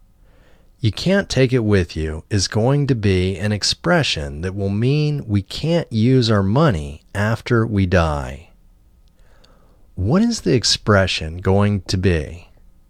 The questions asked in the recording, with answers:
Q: What is the expression going to be?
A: The expression is going to be, "You can't take it with you."